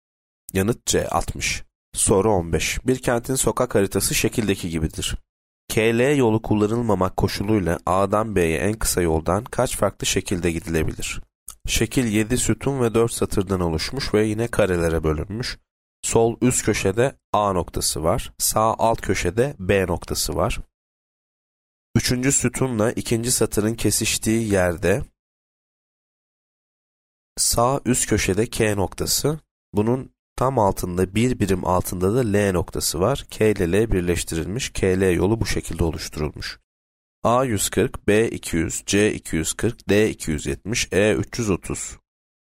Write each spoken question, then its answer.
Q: KL yolu kullanılmamak koşuluyla A'dan B'ye en kısa yoldan kaç farklı şekilde gidilebilir?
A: Yanıt D 270.